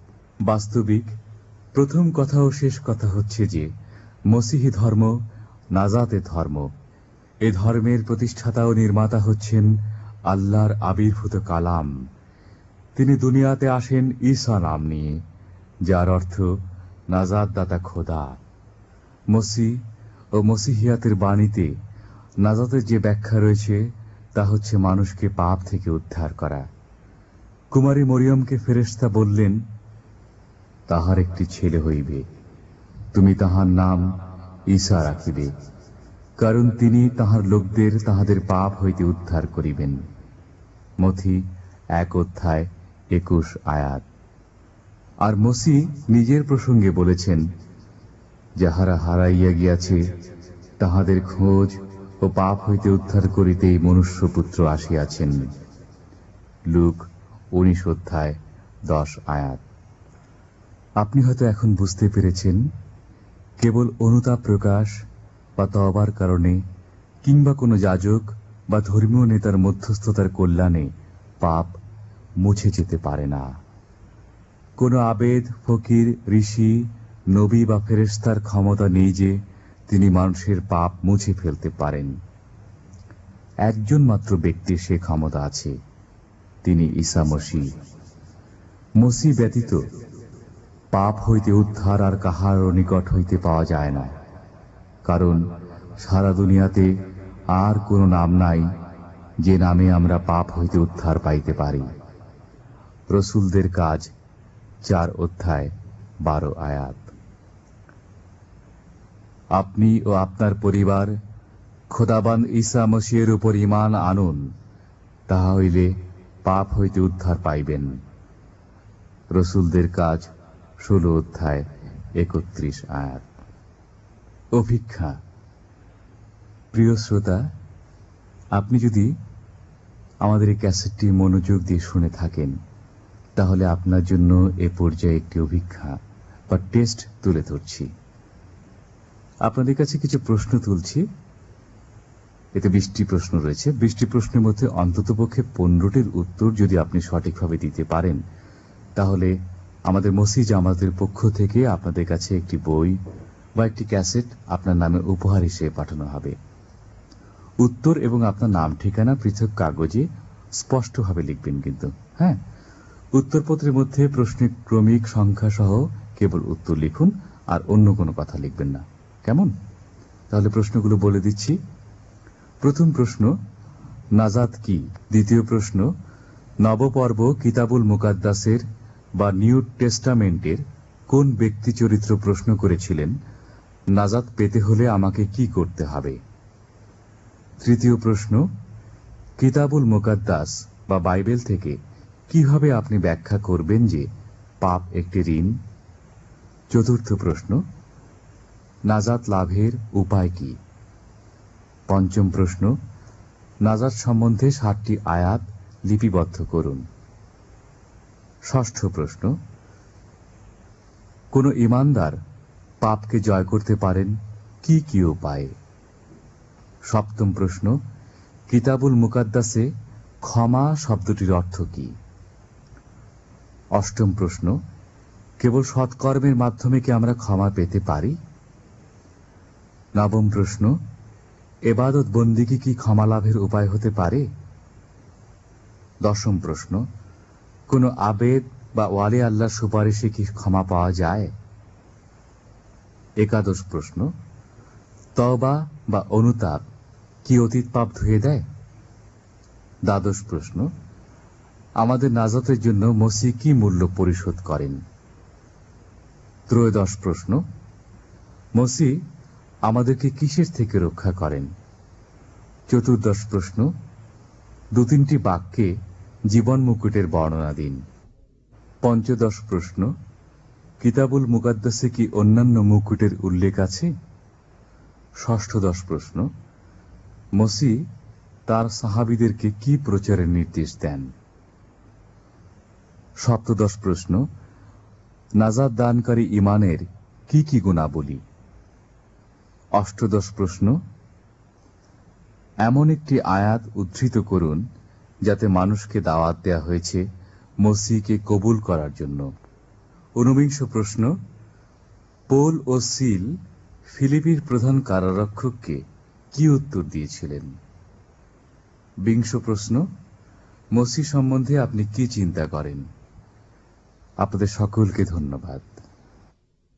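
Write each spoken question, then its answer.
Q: কোনো আবেদ বা ওয়ালি আল্লাহর সুপারিশে কি ক্ষমা পাওয়া যায়?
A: না, একমাত্র ঈসা মসীহই পাপ মুছে ফেলতে পারেন

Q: মসি আমাদেরকে কিসের থেকে রক্ষা করেন?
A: পাপ থেকে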